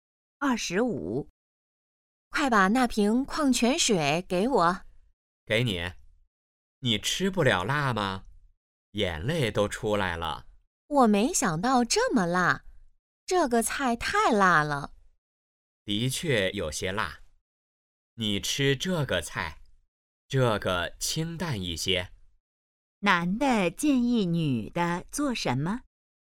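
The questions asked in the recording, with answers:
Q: 男的建议女的做什么?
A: 吃清淡一些的菜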